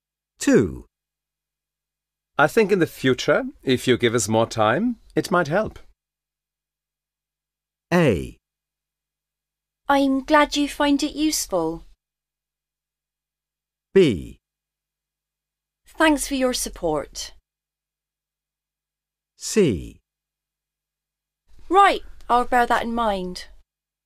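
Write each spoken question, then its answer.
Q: I think in the future, if you give us more time, it might help.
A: C: Right, I'll bear that in mind.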